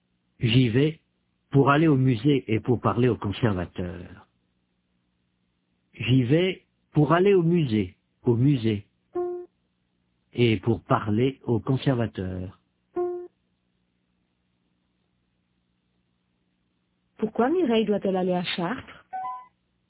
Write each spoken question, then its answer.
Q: Pourquoi Mireille doit-elle aller à Chartres?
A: Pour aller au musée et pour parler au conservateur.